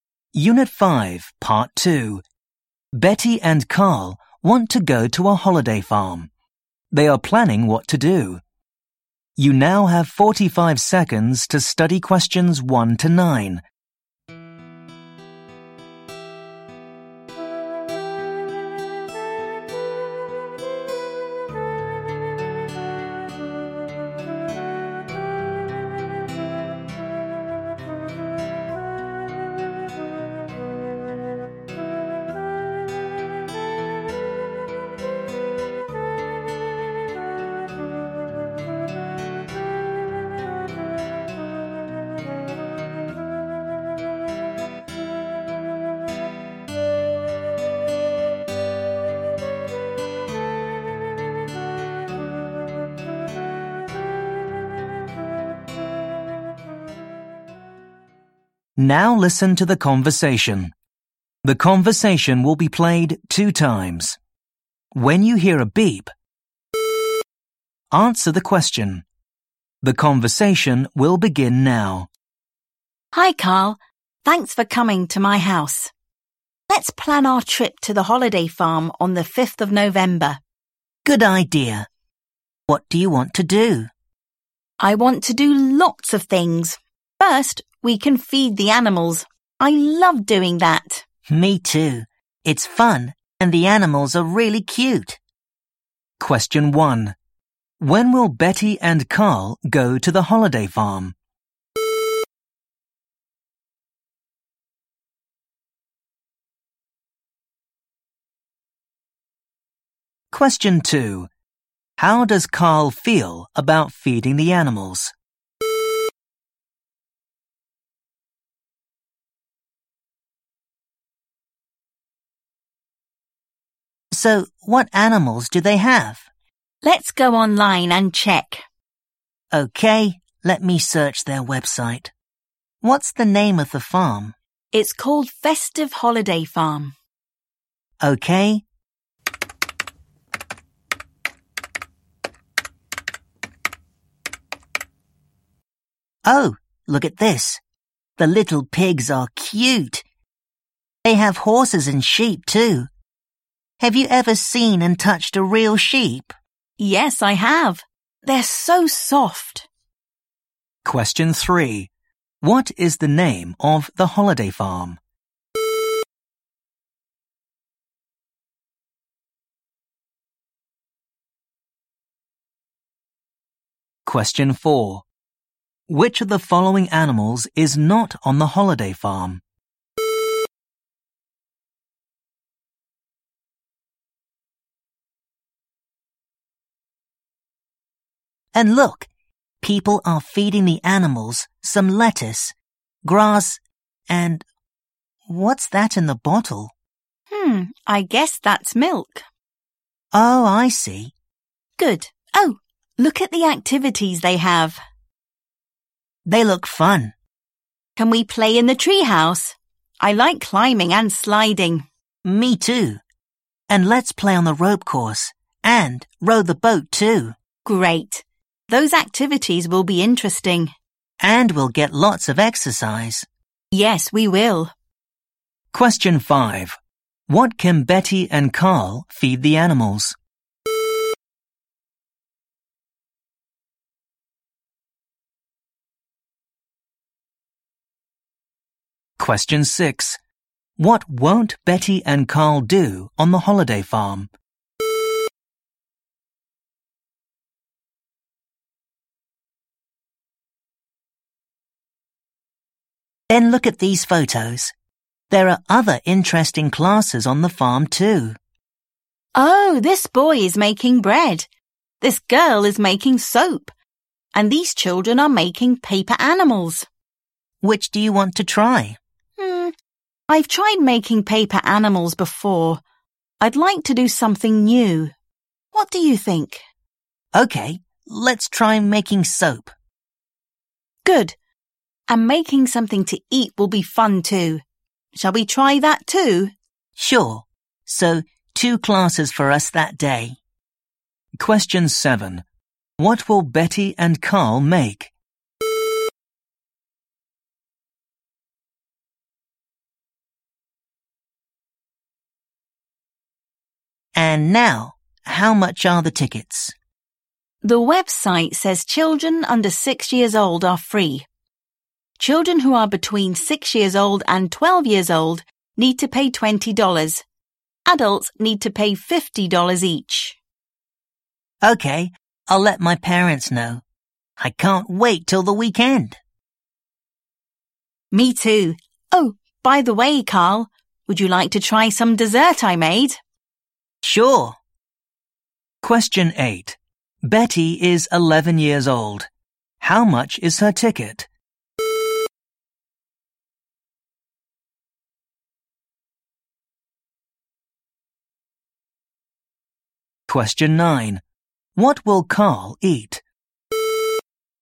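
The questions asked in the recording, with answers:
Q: When will Betty and Carl go to the holiday farm?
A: On the 5th of November

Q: How does Carl feel about feeding the animals?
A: He loves it; it's fun

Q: What is the name of the holiday farm?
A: Festive Holiday Farm

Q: What can Betty and Carl feed the animals?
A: Lettuce, grass and milk

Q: What will Betty and Carl make?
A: Soap and bread

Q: Betty is 11 years old. How much is her ticket?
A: $20

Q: What will Carl eat?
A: Some dessert Betty made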